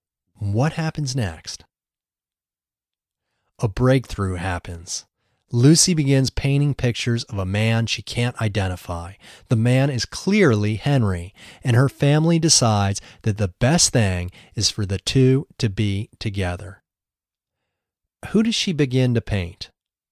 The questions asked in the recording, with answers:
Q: Who does she begin to paint?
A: She begins to paint Henry.